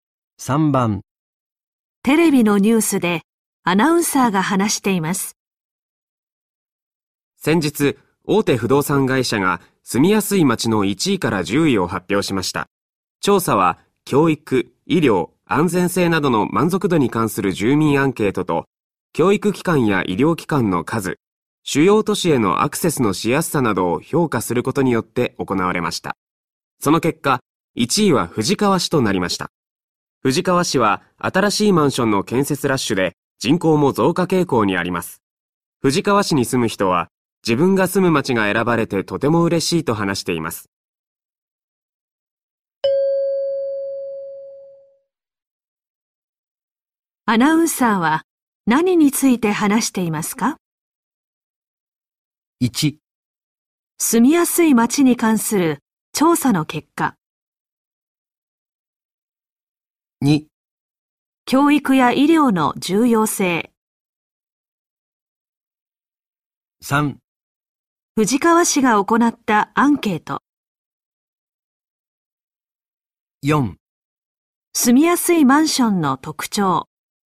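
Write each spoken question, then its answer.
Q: アナウンサーは何について話していますか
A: 1: 住みやすい町に関する調査の結果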